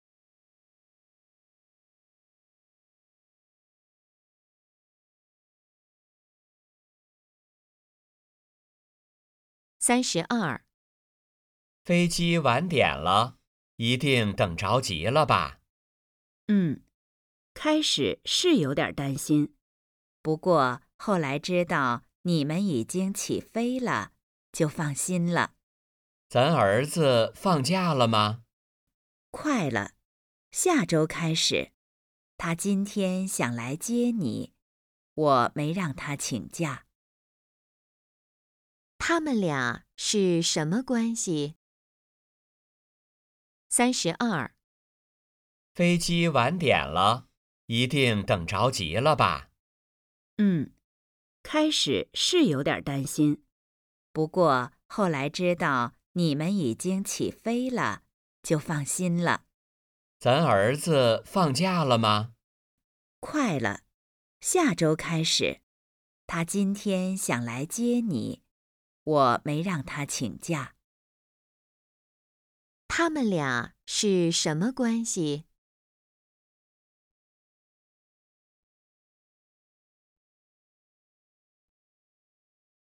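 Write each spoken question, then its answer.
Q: 他们俩是什么关系?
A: 夫妻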